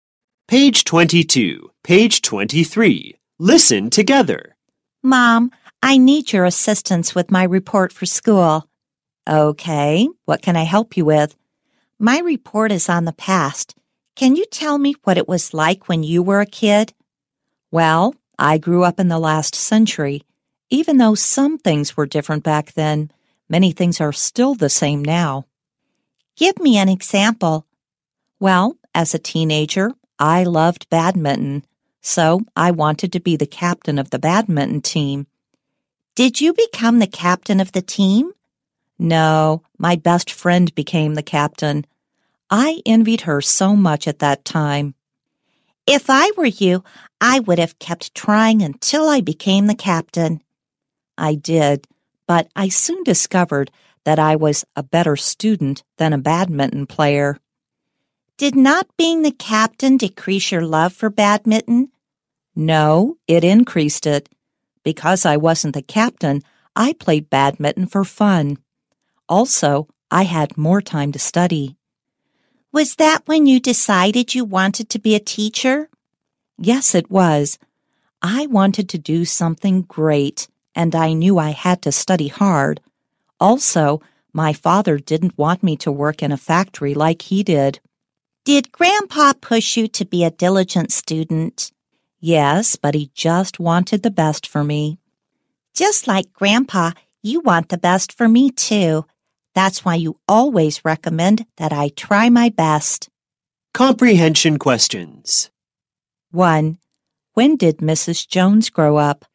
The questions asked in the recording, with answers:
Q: When did Mrs. Jones grow up?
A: She grew up in the last century.